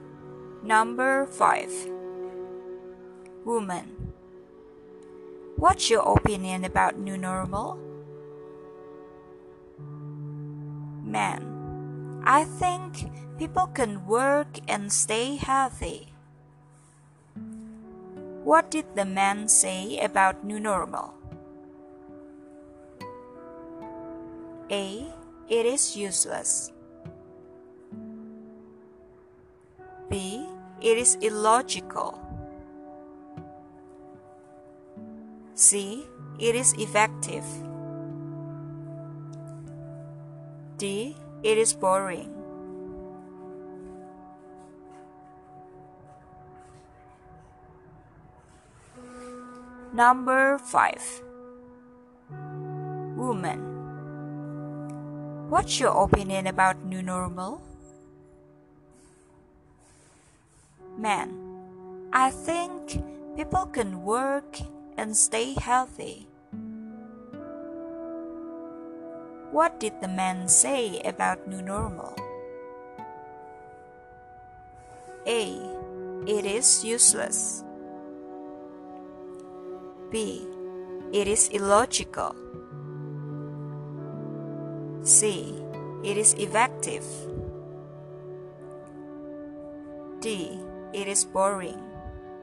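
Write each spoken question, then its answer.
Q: What did the man say about new normal?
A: C: It is effective.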